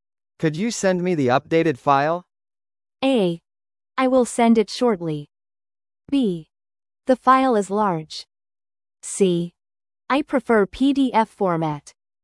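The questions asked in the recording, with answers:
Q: Could you send me the updated file?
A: A: I will send it shortly.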